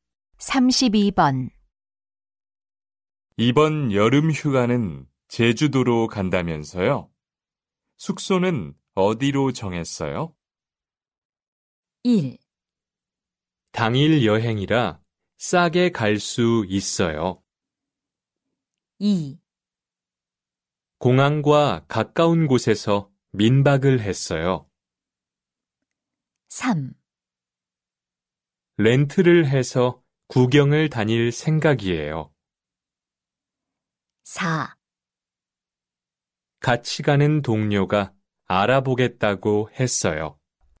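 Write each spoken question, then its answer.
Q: 이번 여름 휴가는 제주도로 간다면서요? 숙소는 어디로 정했어요?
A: 4: 같이 가는 동료가 알아보겠다고 했어요.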